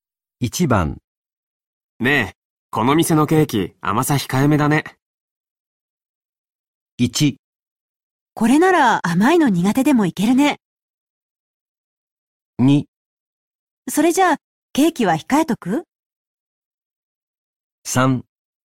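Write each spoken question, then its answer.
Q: ねえ、この店のケーキ、甘さ控えめだね。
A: 1: これなら甘いの苦手でもいけるね。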